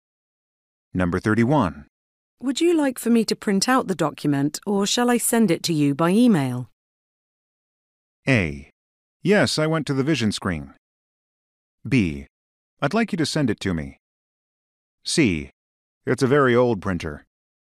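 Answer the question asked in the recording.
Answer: B: I'd like you to send it to me.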